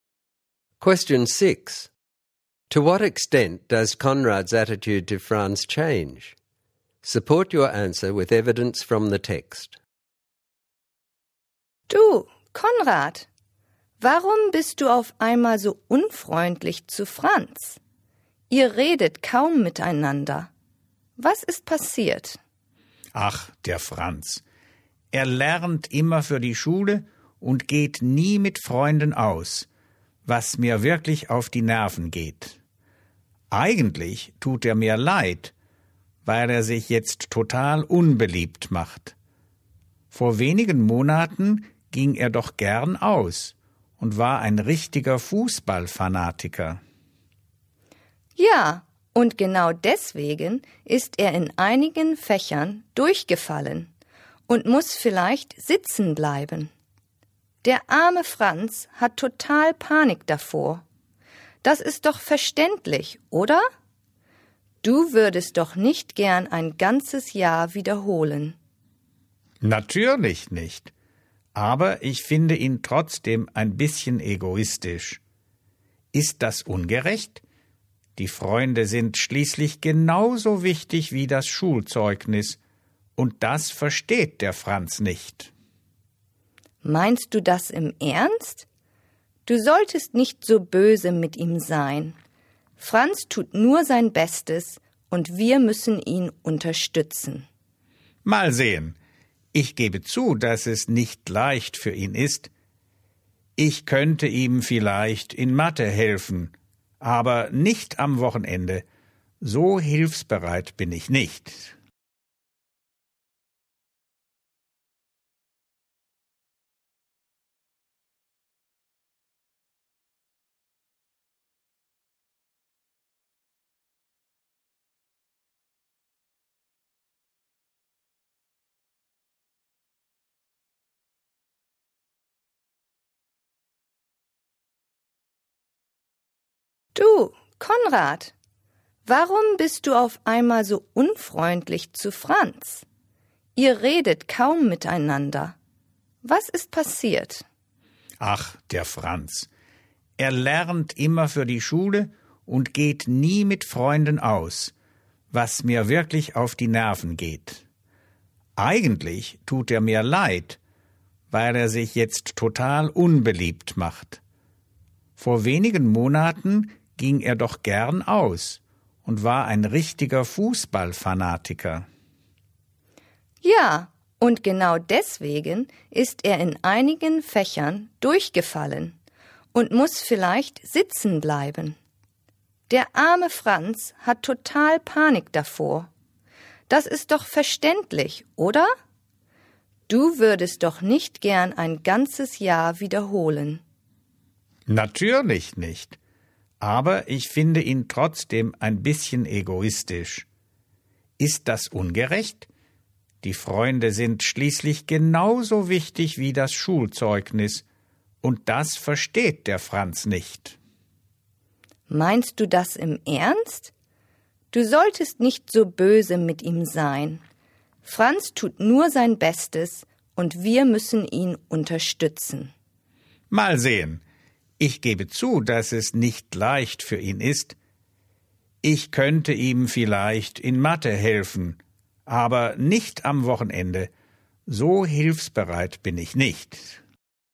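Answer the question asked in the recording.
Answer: Only slightly: he admits it is hard for Franz and offers help in maths, but still finds him selfish and won't help at weekends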